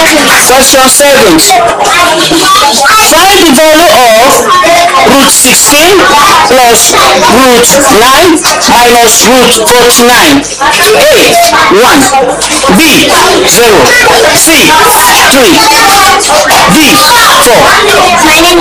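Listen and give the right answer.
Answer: B: 0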